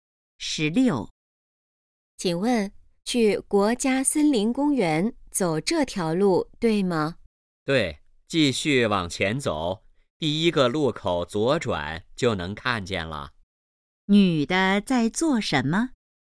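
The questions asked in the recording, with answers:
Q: 女的在做什么?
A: 问路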